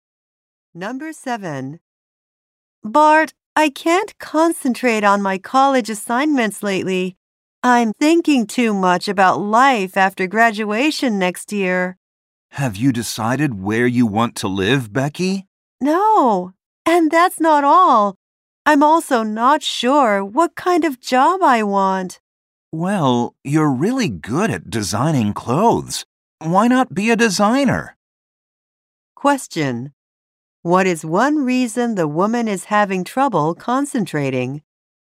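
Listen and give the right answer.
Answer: She is thinking about life after graduation.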